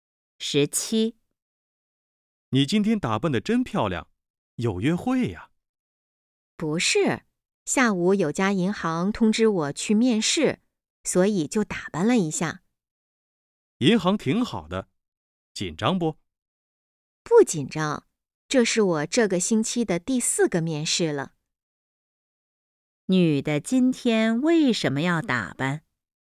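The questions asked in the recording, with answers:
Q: 女的今天为什么要打扮?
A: 下午要去银行面试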